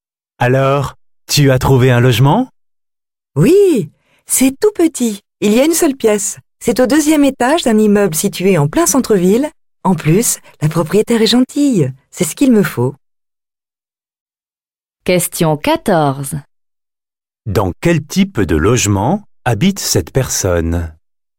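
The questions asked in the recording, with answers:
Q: Dans quel type de logement habite cette personne?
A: Un petit appartement d'une pièce (studio) en centre-ville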